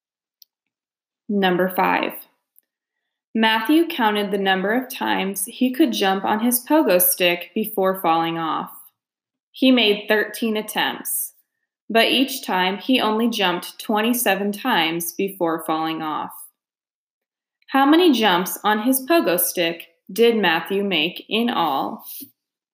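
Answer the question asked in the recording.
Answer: 351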